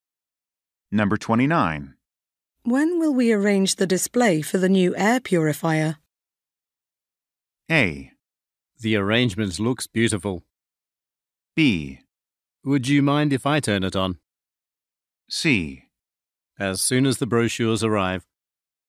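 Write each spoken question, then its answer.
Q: When will we arrange the display for the new air purifier?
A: C: As soon as the brochures arrive.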